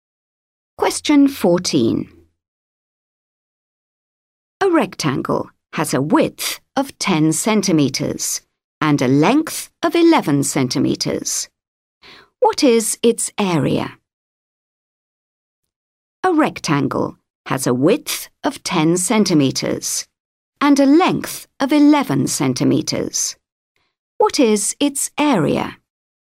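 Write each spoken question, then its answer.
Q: What is its area?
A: 110 square centimeters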